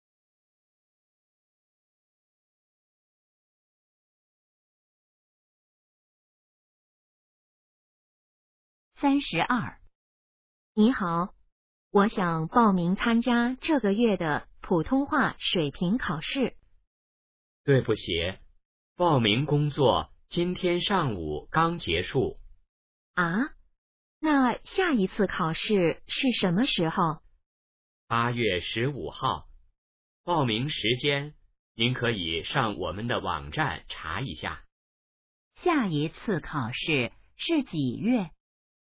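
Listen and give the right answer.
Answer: 8月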